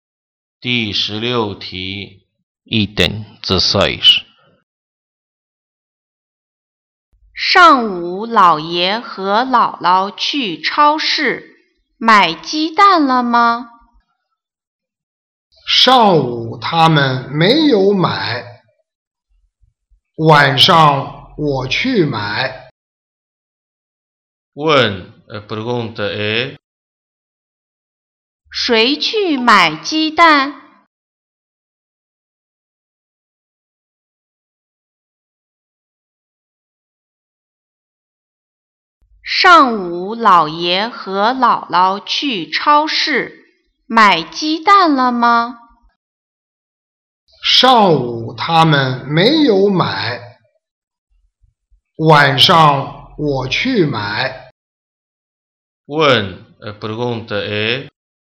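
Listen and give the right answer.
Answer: 说话人(我)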